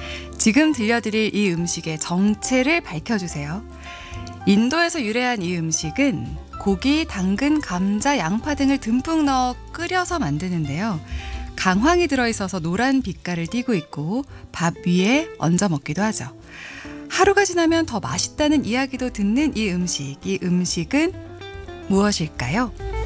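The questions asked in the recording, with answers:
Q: 이 음식은 무엇일까요?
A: 카레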